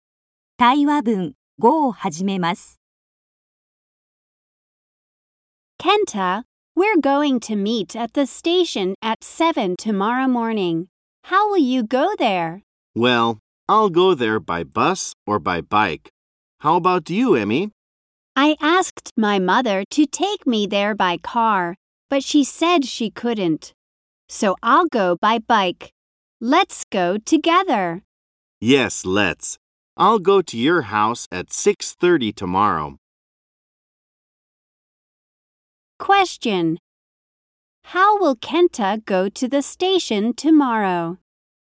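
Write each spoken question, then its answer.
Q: How will Kenta go to the station tomorrow?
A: By bike.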